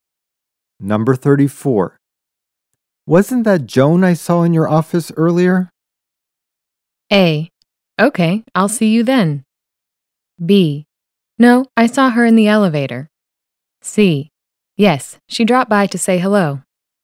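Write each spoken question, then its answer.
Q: Wasn't that Joan I saw in your office earlier?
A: C: Yes, she dropped by to say hello.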